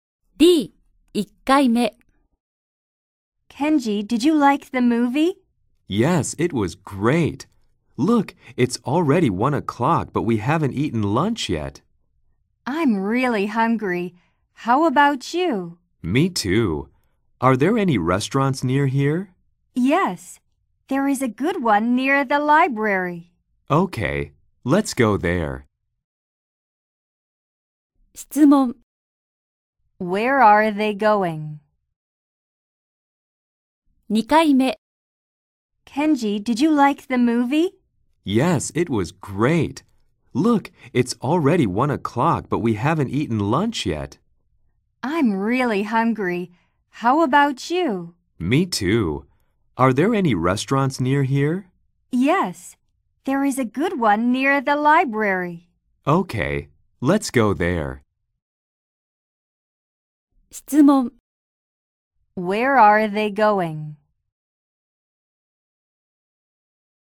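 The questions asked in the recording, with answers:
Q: Where are they going?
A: To a restaurant near the library.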